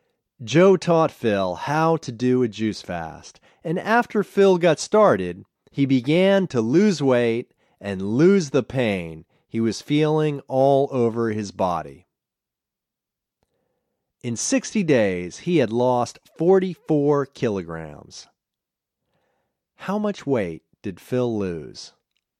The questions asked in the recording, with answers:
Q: How much weight did Phil lose?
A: Phil lost 44 kilograms.